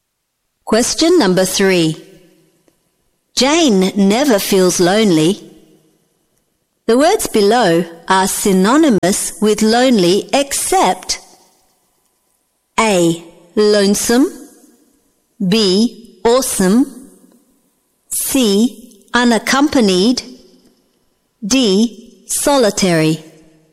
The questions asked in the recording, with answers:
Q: The words below are synonymous with lonely except A.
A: B. Awesome.